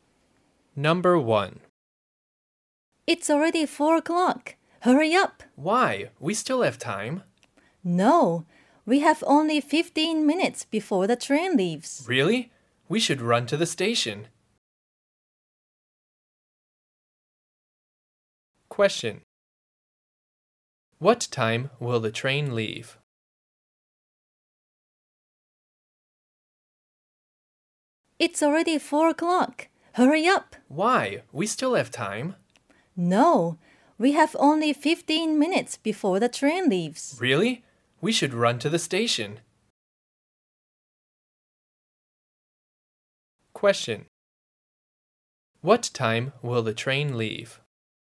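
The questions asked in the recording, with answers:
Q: What time will the train leave?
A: At 4:15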